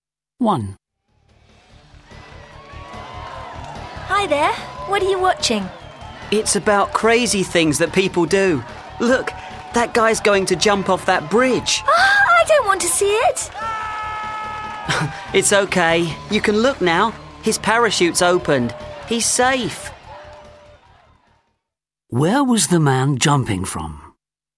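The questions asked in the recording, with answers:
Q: Where was the man jumping from?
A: A bridge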